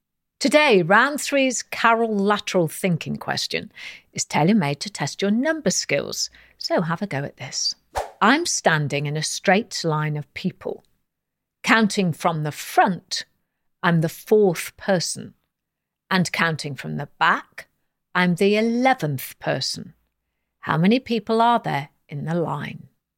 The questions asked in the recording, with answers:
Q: How many people are there in the line?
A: And the answer is 14 people.